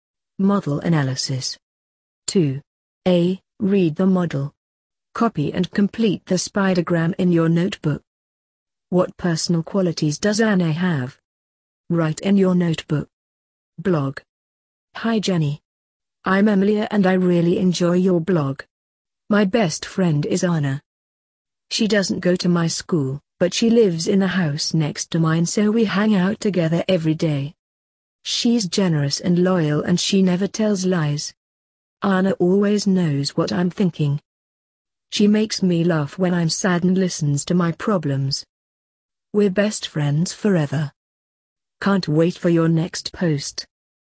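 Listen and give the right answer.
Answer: She's generous and loyal and never tells lies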